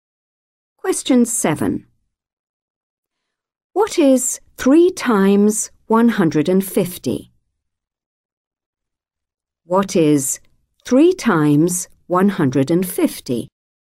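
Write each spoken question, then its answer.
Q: What is 3 times 150?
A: 450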